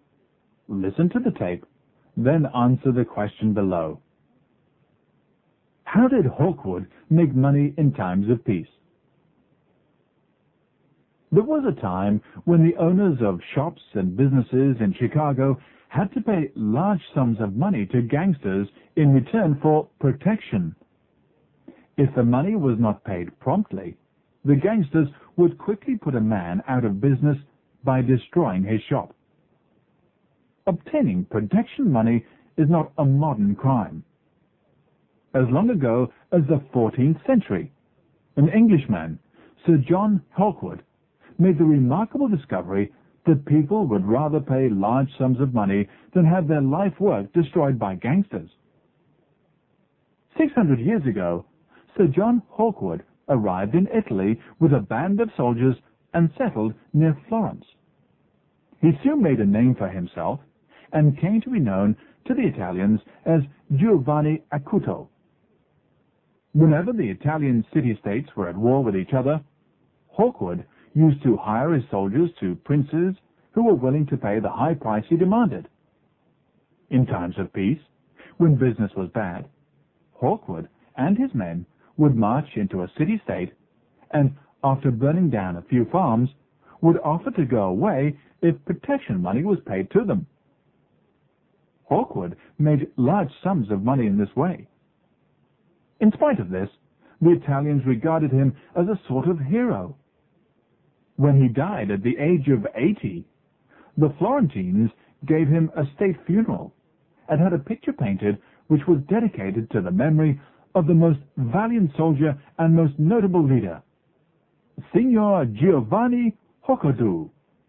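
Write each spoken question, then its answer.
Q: How did Hawkwood make money in times of peace?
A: By marching into city-states, burning a few farms, and demanding protection money to go away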